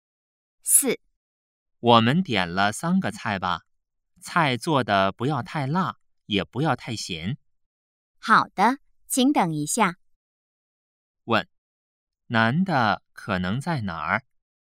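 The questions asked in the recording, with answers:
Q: 问,男的可能在哪儿?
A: 饭馆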